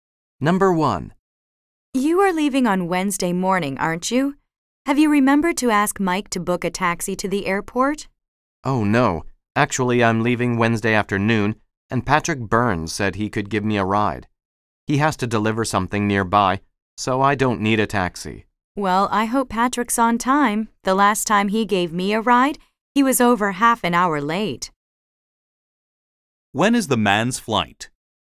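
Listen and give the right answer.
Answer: Wednesday afternoon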